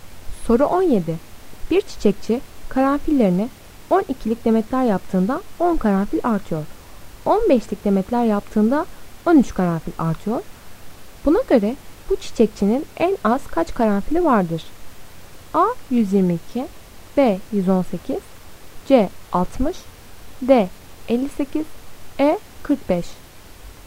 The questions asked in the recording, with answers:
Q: Buna göre bu çiçekçinin en az kaç karanfili vardır?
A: Doğru cevap D 58.